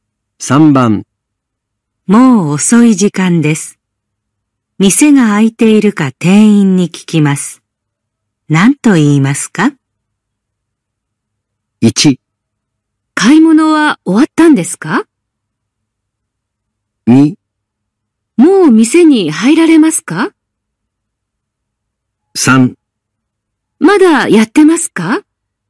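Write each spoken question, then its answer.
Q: 何と言いますか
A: 3: まだやってますか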